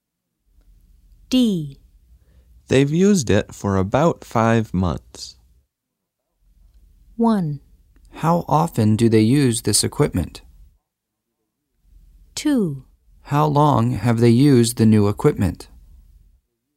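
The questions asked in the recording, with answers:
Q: They've used it for about 5 months.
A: 2: How long have they used the new equipment?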